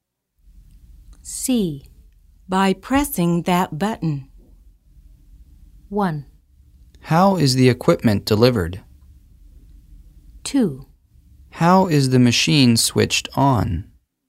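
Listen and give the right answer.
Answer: 2: How is the machine switched on?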